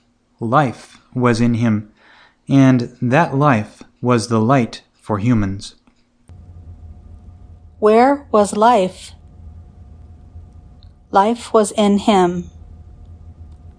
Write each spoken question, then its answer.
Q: Where was life?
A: Life was in Him.